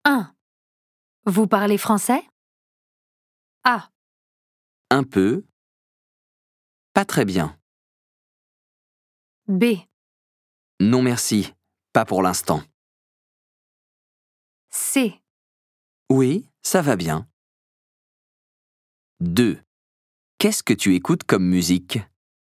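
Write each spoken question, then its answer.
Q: Vous parlez français?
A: A: Un peu. Pas très bien.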